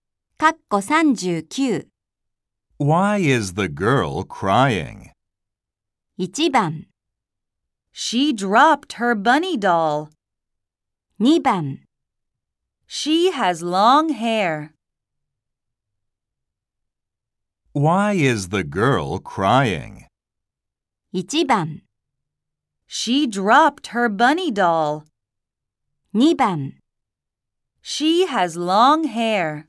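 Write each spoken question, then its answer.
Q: Why is the girl crying?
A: 1: She dropped her bunny doll.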